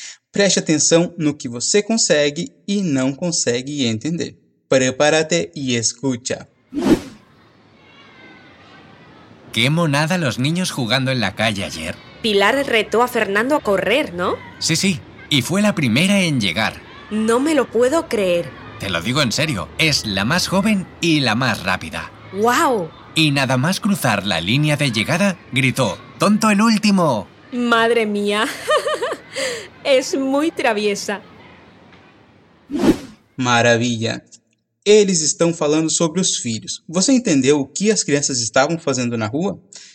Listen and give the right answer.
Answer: as crianças brincando na rua